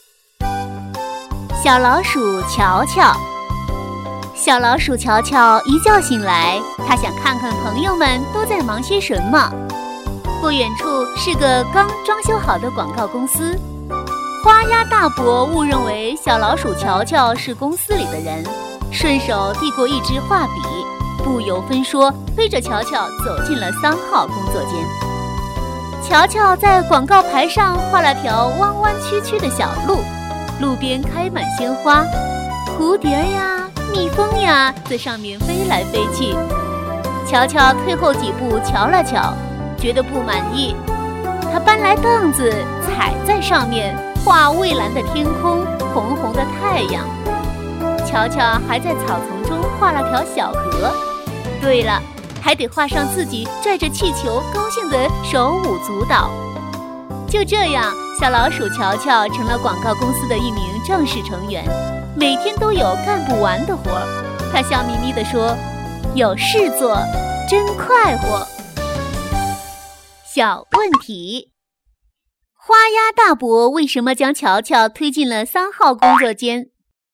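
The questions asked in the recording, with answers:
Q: 花鸭大伯为什么将乔乔推进了三号工作间?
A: 他误认为乔乔是公司里的人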